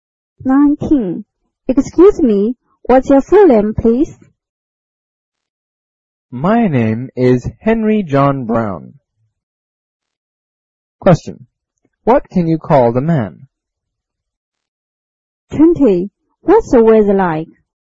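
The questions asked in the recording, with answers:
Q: What can you call the man?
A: Mr. Brown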